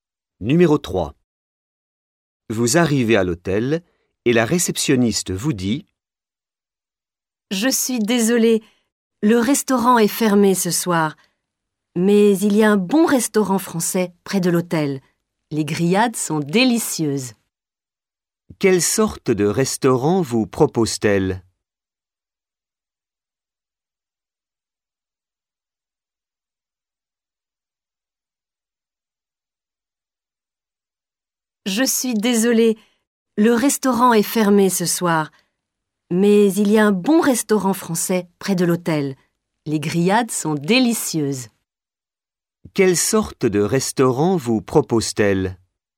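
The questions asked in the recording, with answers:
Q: Quelle sorte de restaurant vous propose-t-elle?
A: Un restaurant français (grillades)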